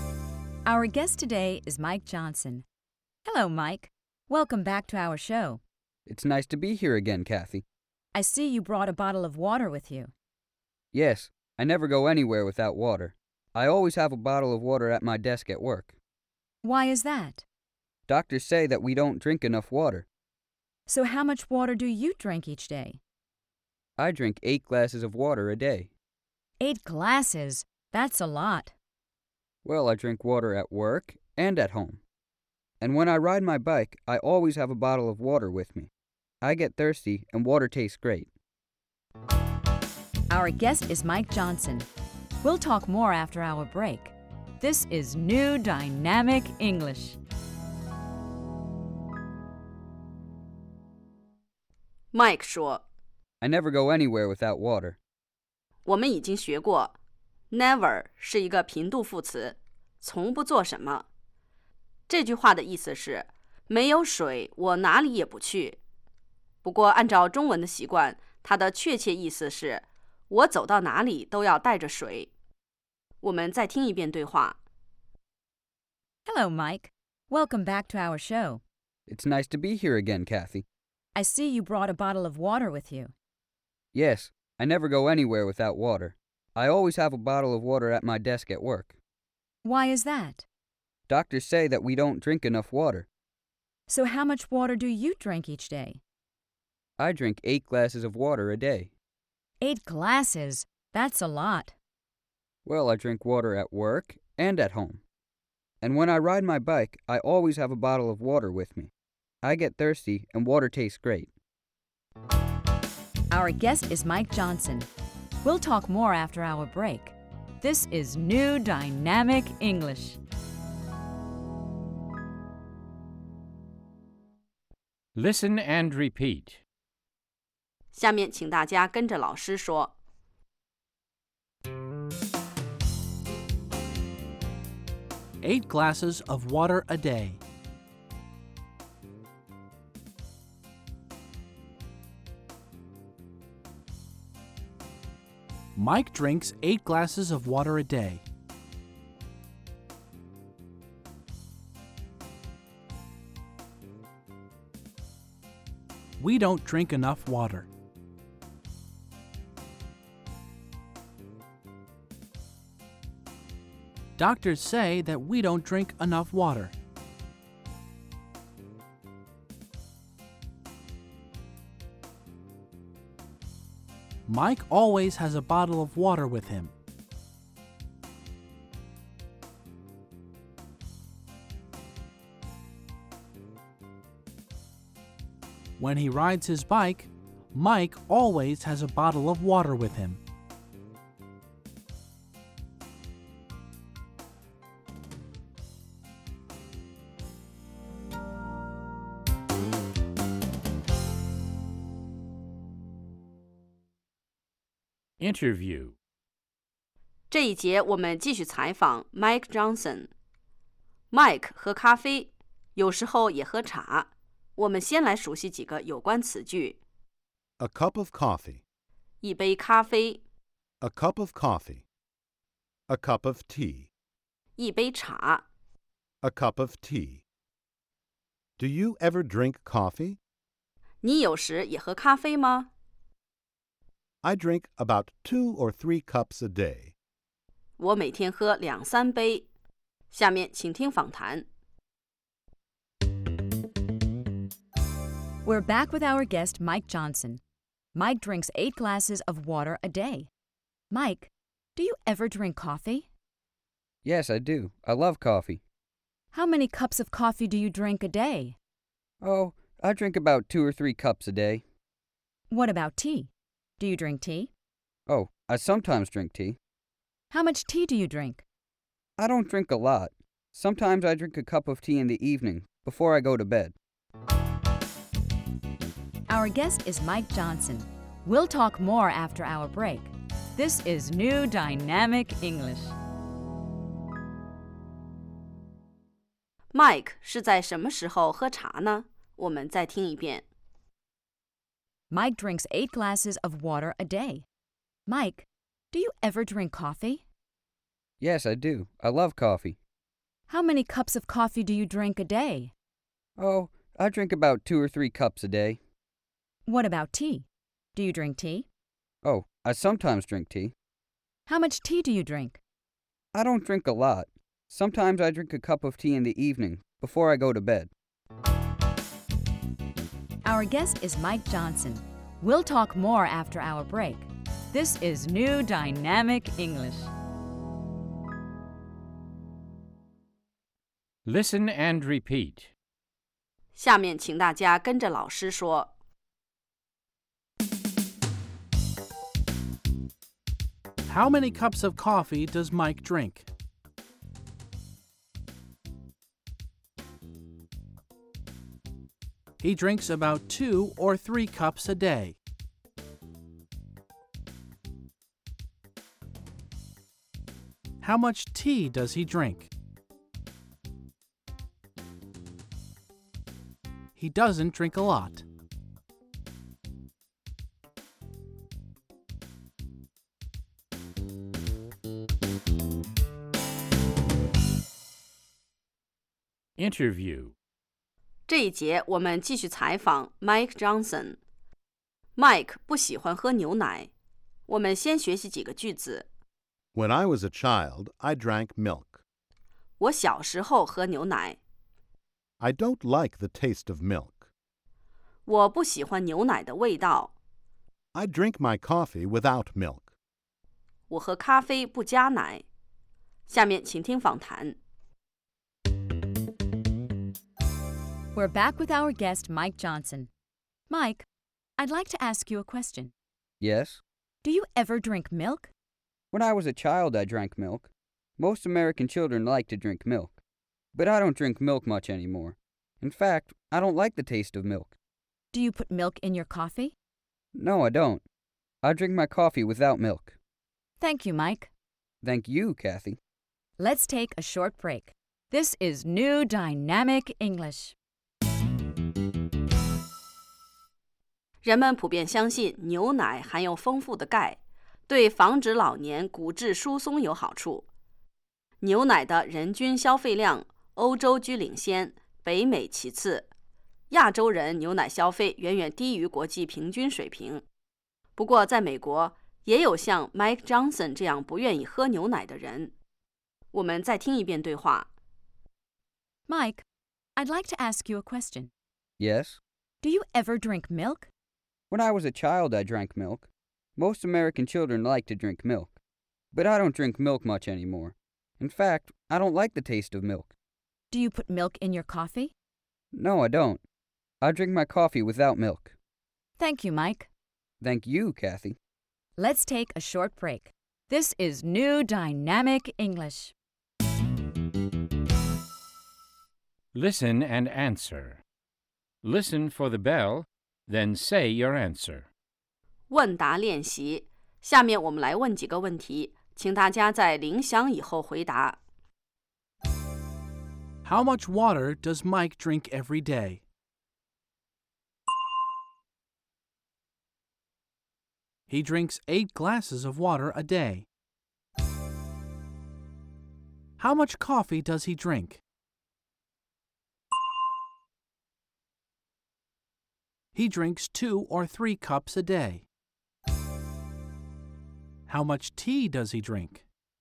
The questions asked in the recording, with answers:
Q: How much water does Mike drink every day?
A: He drinks 8 glasses of water a day.

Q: How much tea does he drink?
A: He doesn't drink a lot.